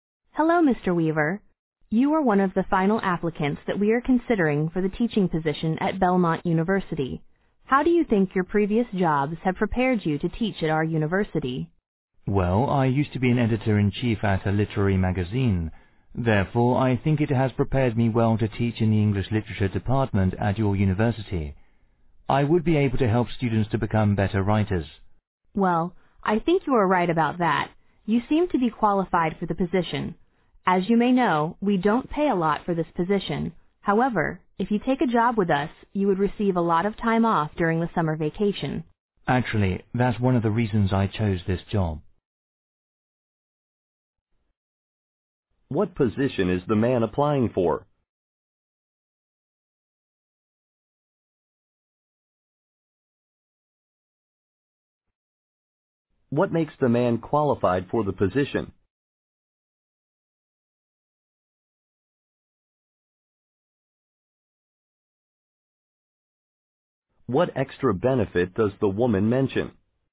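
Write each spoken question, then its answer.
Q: What position is the man applying for?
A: A teaching position in the English Literature Department at Belmont University

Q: What makes the man qualified for the position?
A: He used to be editor-in-chief at a literary magazine

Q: What extra benefit does the woman mention?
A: A lot of time off during the summer vacation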